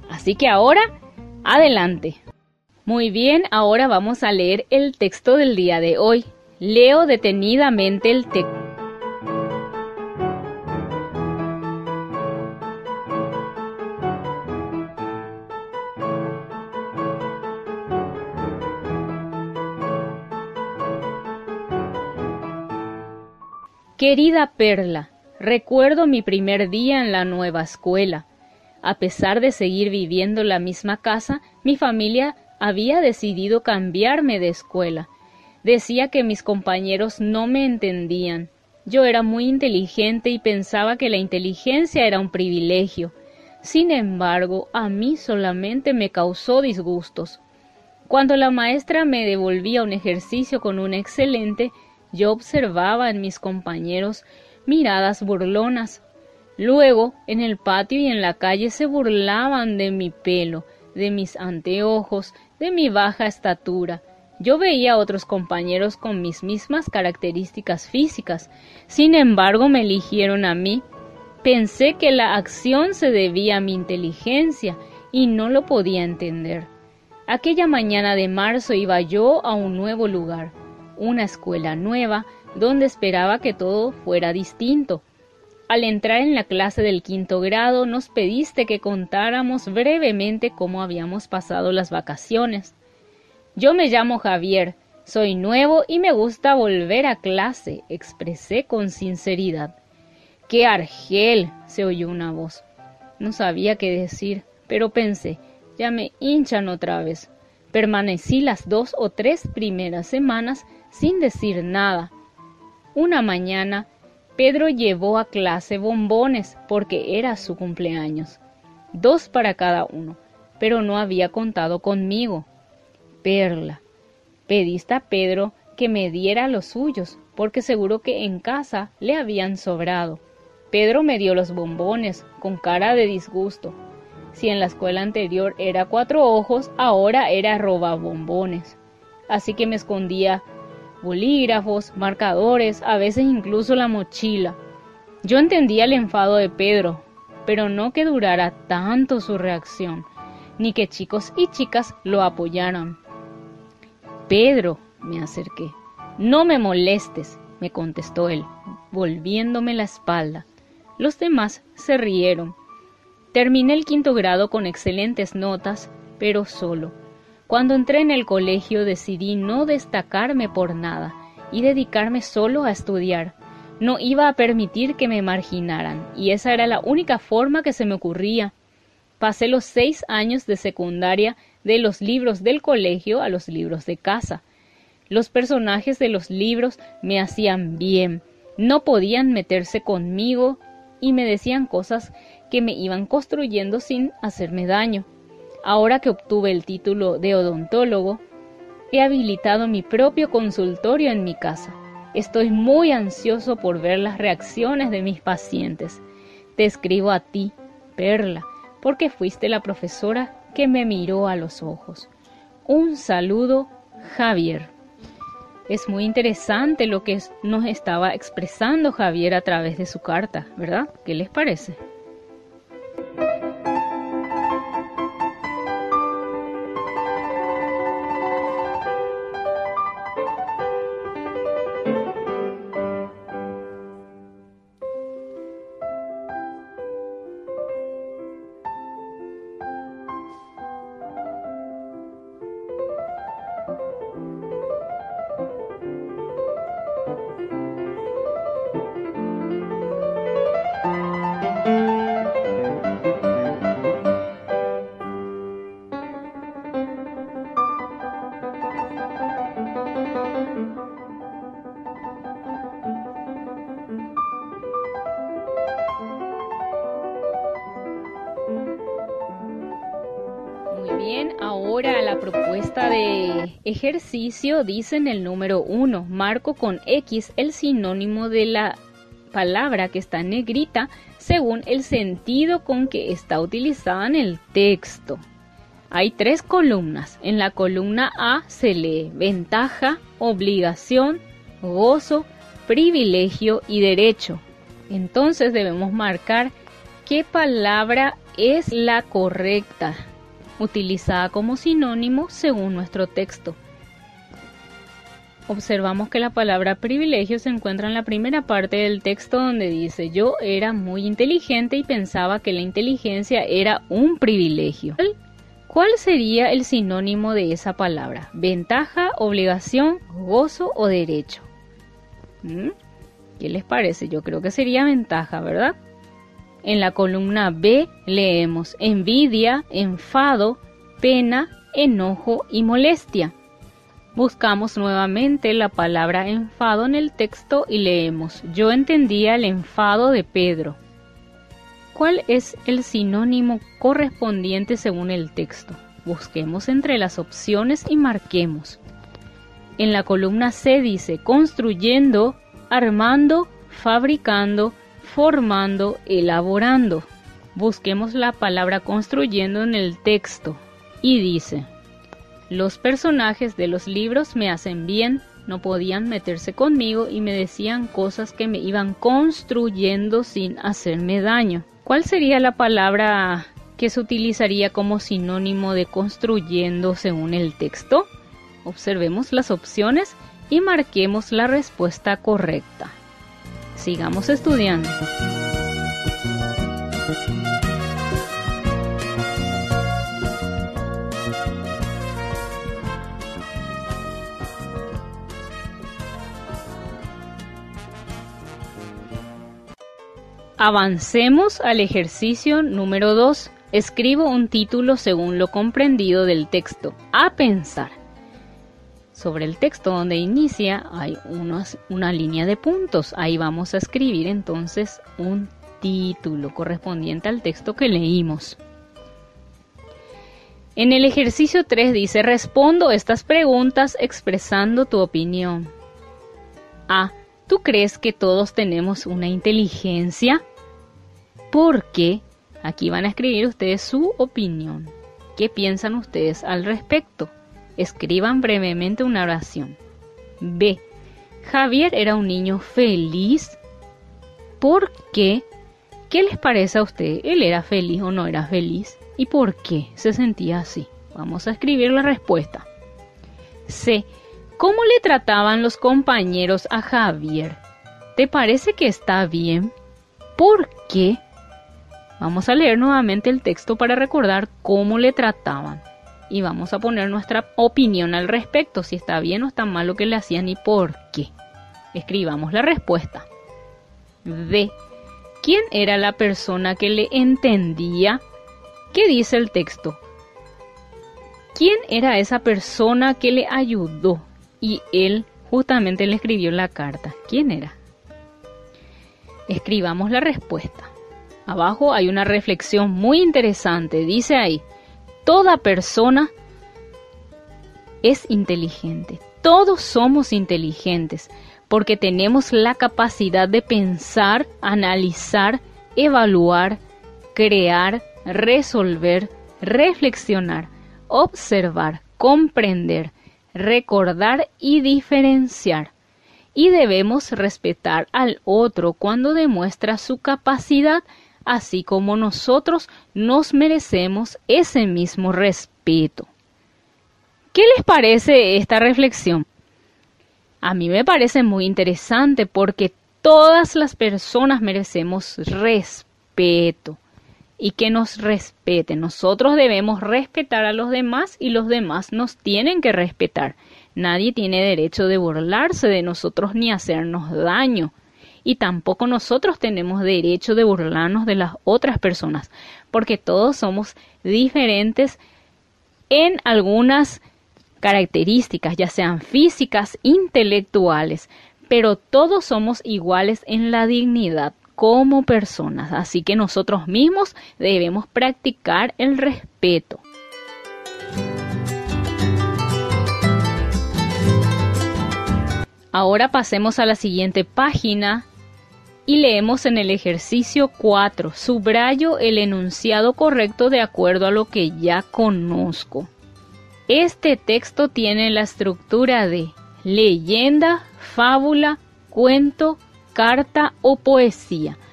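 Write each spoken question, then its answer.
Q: ¿Quién era la persona que le entendía?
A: Perla, su profesora

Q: Este texto tiene la estructura de leyenda, fábula, cuento, carta o poesía.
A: carta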